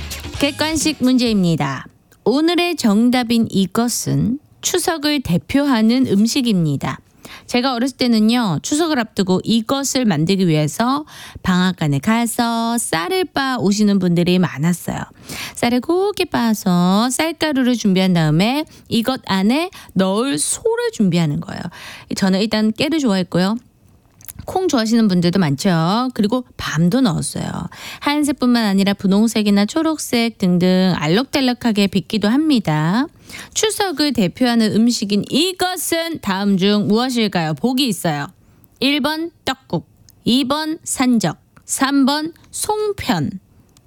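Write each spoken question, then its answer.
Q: 추석을 대표하는 음식인 이것은 다음 중 무엇일까요?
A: 3: 송편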